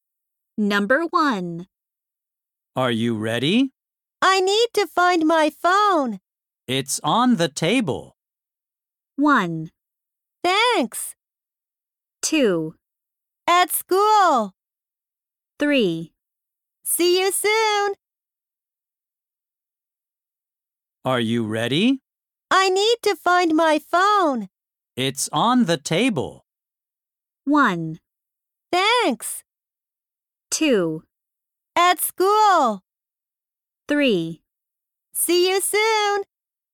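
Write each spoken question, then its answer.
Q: It's on the table.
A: 1: Thanks.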